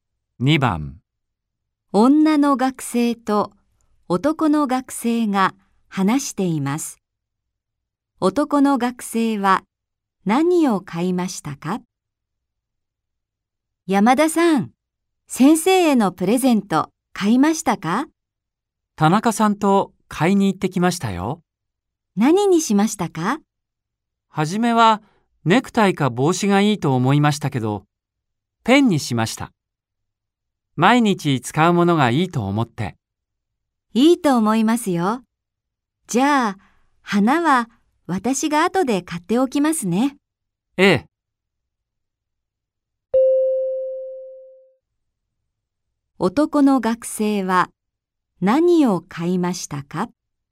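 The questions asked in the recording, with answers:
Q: 男の学生は何を買いましたか?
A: ペン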